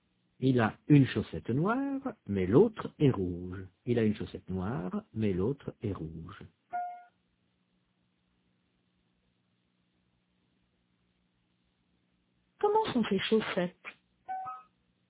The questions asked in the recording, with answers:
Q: Comment sont ses chaussettes?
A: Il a une chaussette noire, mais l'autre est rouge.